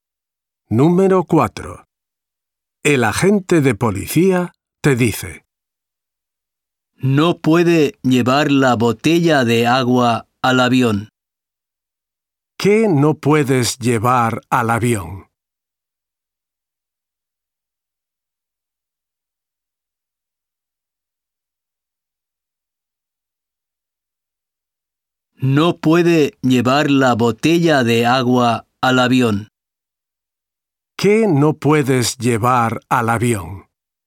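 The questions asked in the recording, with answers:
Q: ¿Qué no puedes llevar al avión?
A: la botella de agua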